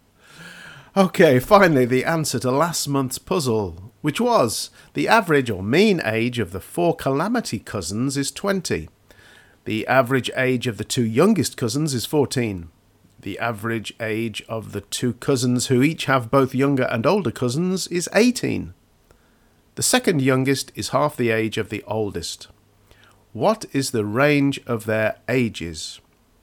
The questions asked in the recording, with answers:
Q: What is the range of their ages?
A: So the range, the largest, subtract the smallest, 32 minus 12 is 20.